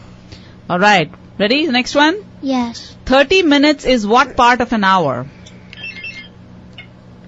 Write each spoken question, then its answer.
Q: 30 minutes is what part of an hour?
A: Half